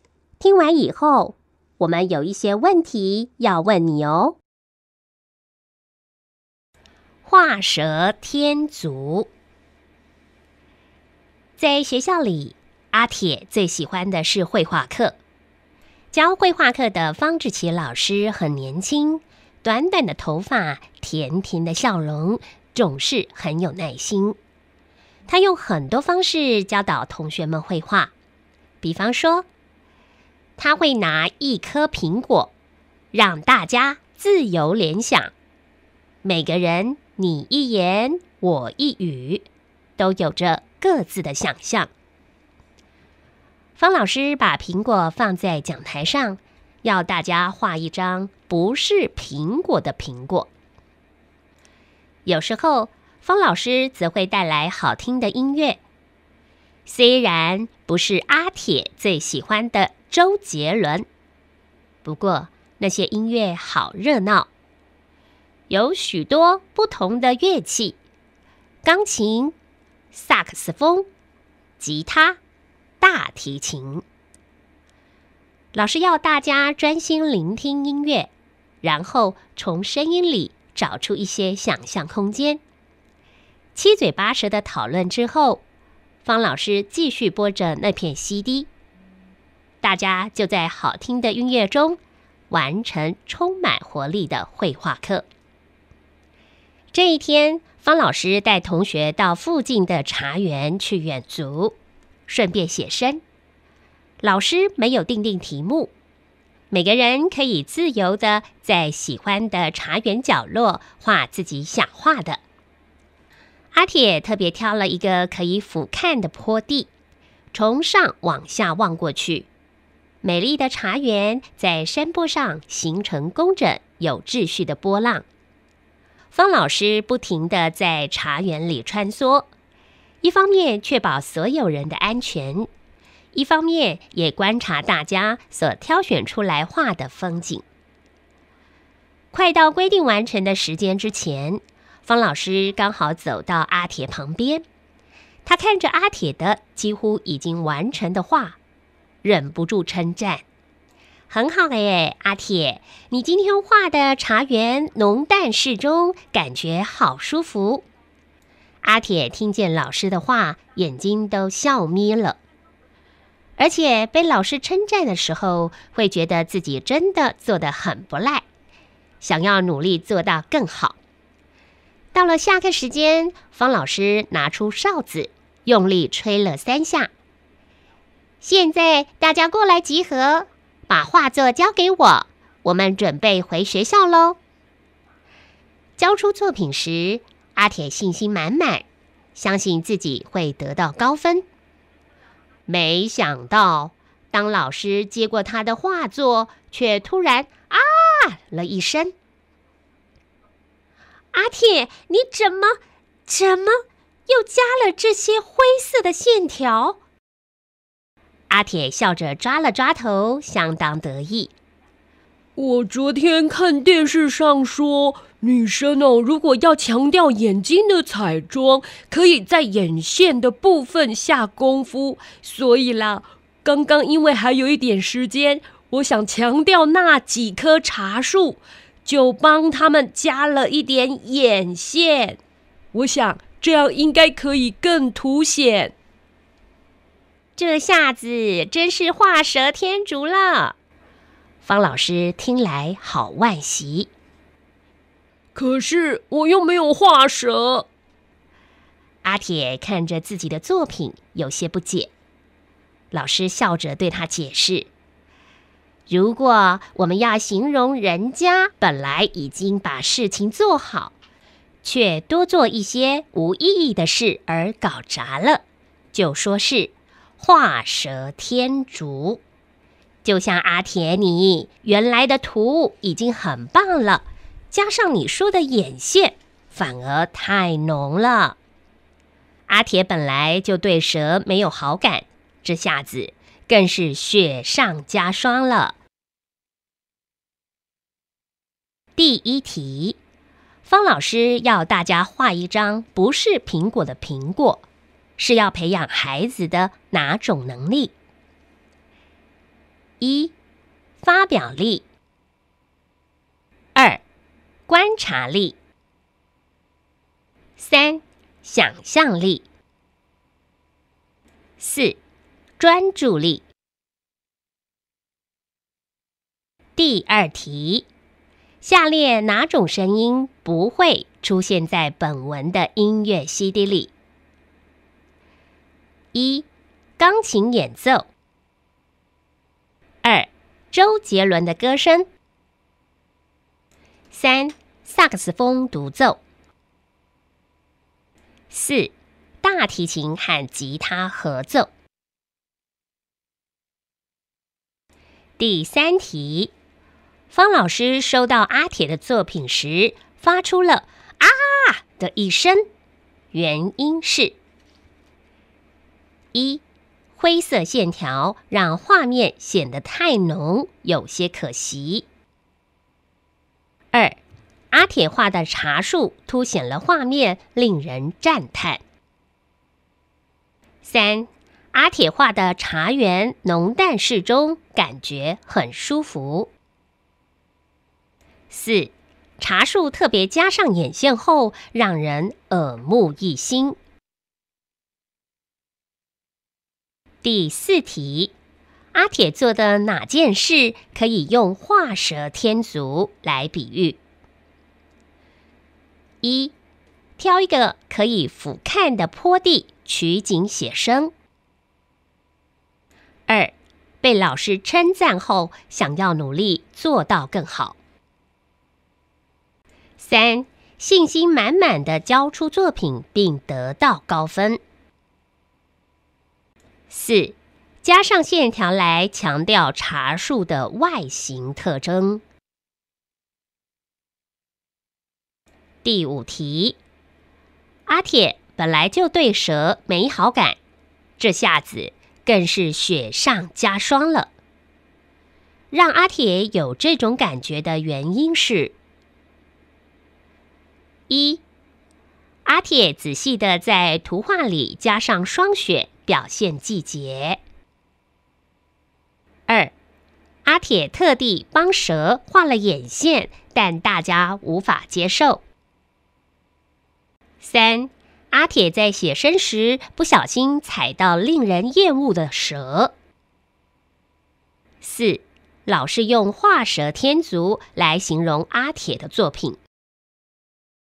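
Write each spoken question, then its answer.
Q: 方老师要大家画一张不是苹果的苹果,是要培养孩子的哪种能力?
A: 三:想象力

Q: 方老师收到阿铁的作品时发出了啊的一声,原因是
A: 一:灰色线条让画面显得太浓,有些可惜

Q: 阿铁做的哪件事可以用画蛇添足来比喻?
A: 四:加上线条来强调茶树的外形特征

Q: 让阿铁有这种感觉的原因是:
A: 四:老是用画蛇添足来形容阿铁的作品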